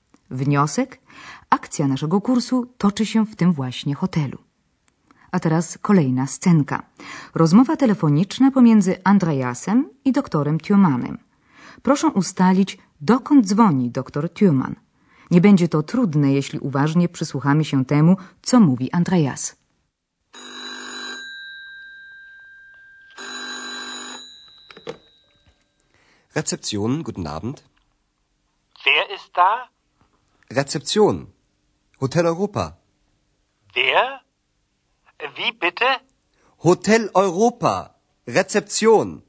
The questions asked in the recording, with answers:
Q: Proszę ustalić, dokąd dzwoni dr Thürmann.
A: Hotel Europa już znamy. Andreas zgłasza się z hotelowej recepcji.